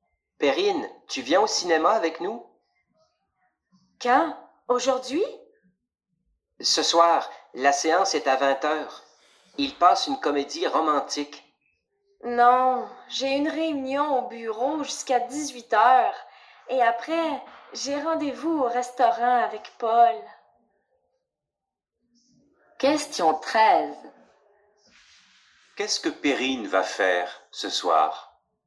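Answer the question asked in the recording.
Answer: Elle va au restaurant avec Paul.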